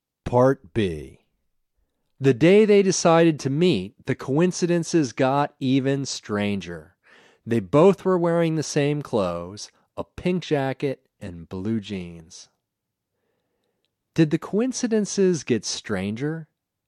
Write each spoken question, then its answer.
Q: Did the coincidences get stranger?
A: Yes, the coincidences got stranger.